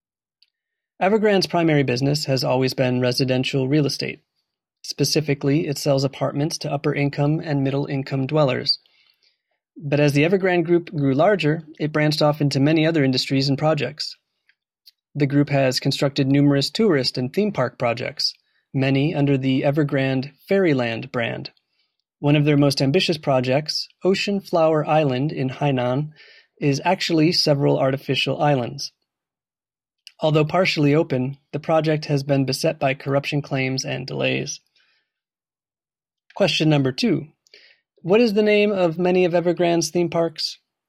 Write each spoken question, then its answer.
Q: What is the name of many of Evergrande's theme parks?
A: They're known as Fairyland theme parks.